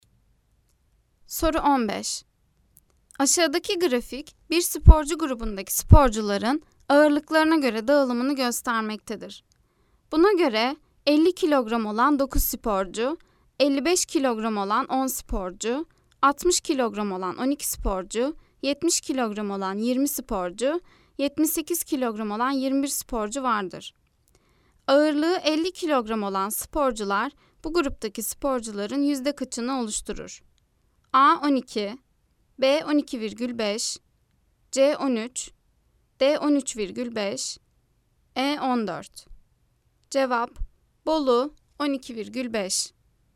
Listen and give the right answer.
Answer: Cevap: Bolu 12,5.